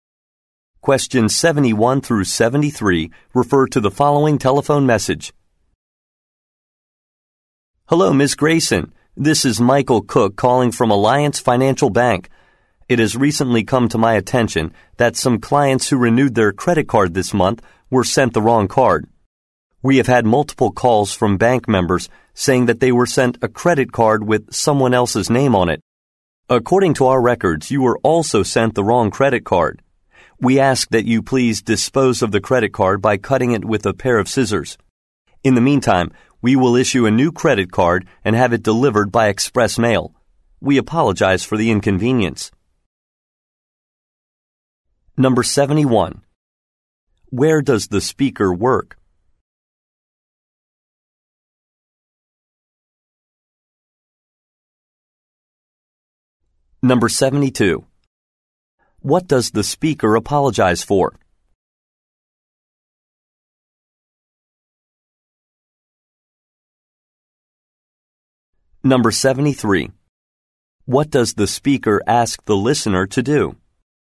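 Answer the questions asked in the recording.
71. At a bank
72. Sending the wrong credit card
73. Cut up the credit card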